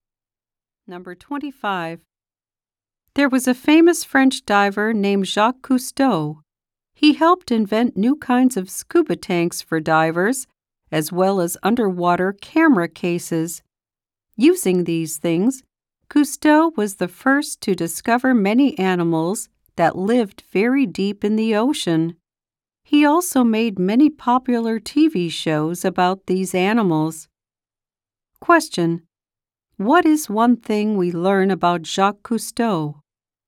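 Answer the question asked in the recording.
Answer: He helped invent new scuba tanks and underwater camera cases.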